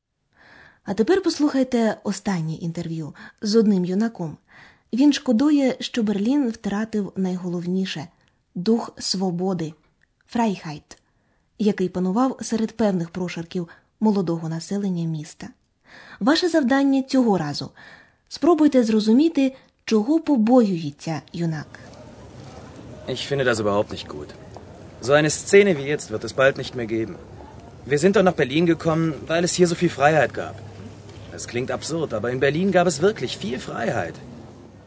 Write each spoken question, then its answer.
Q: Ваше завдання цього разу спробуйте зрозуміти, чого побоюється юнак.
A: Юнак побоюється, що такої сцени, сцени, відтепер більше не буде.